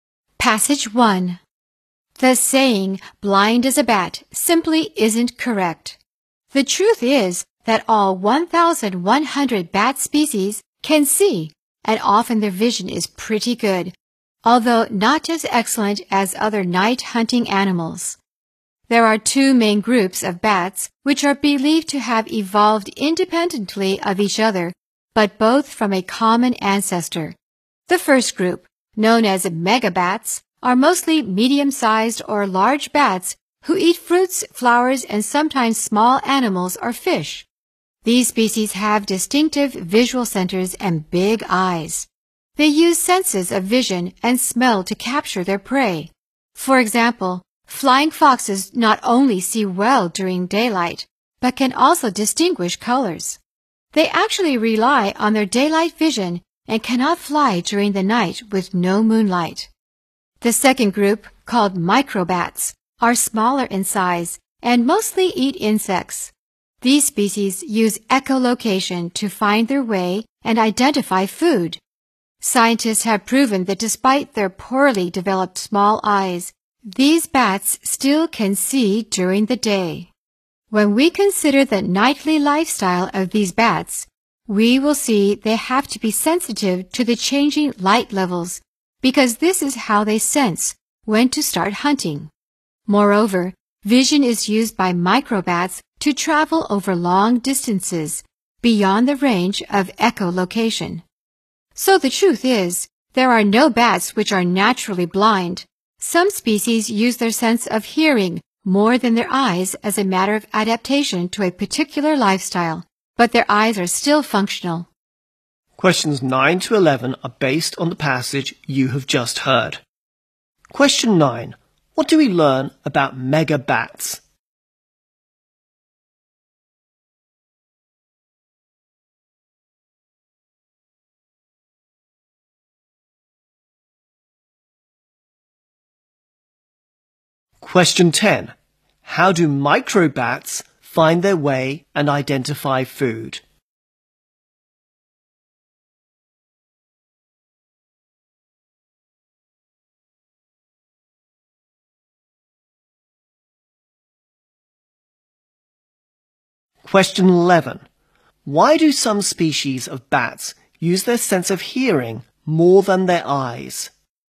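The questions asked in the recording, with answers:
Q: What do we learn about mega bats?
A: They have big eyes and use vision and smell to capture prey

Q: How do microbats find their way and identify food?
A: By echolocation

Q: Why do some species of bats use their sense of hearing more than their eyes?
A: As an adaptation to a particular lifestyle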